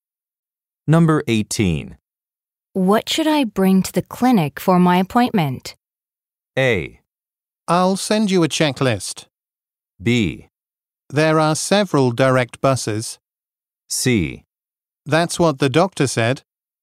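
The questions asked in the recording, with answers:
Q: What should I bring to the clinic for my appointment?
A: A: I'll send you a checklist.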